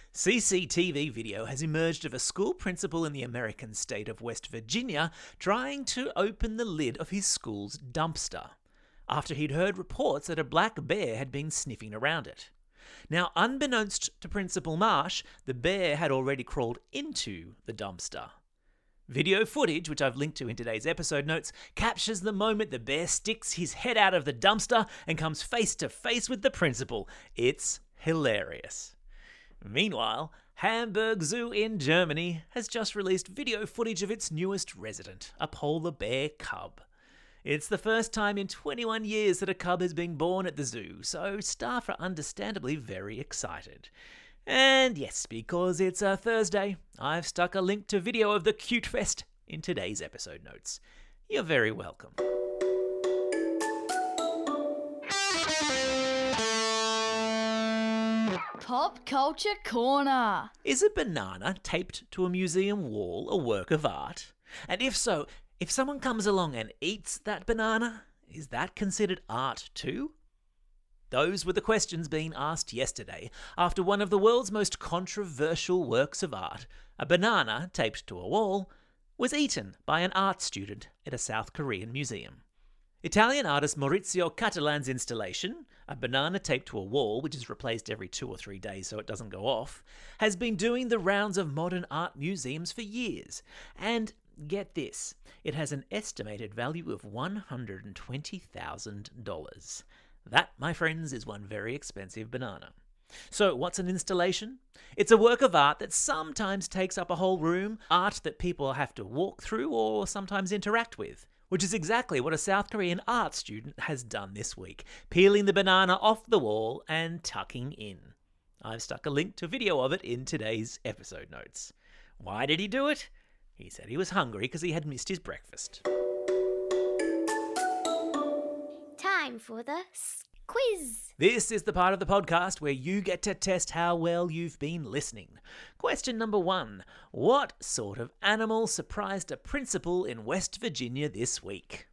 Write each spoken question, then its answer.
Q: What sort of animal surprised a principal in West Virginia this week?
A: Yeah, that's right. It was a black bear.